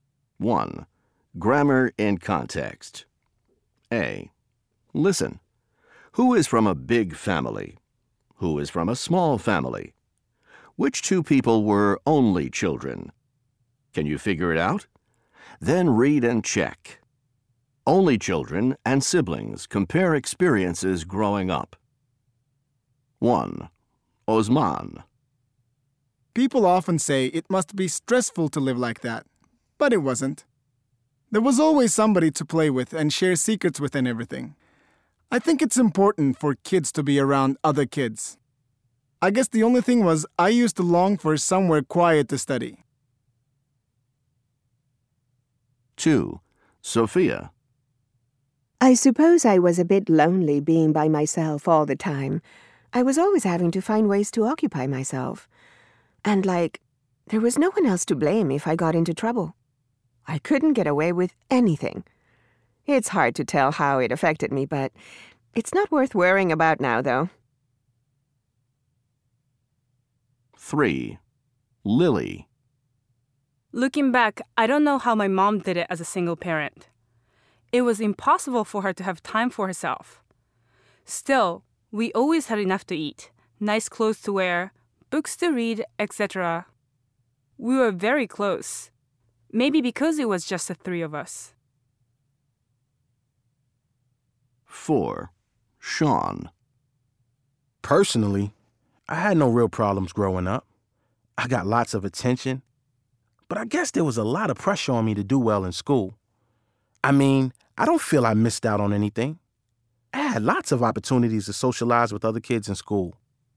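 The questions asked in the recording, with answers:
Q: Who is from a big family?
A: Osman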